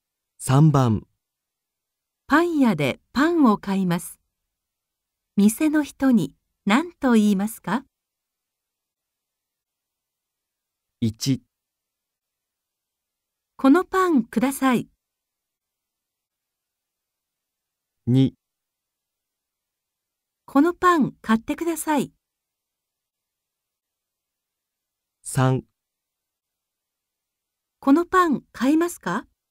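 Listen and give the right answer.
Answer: 1: このパンください。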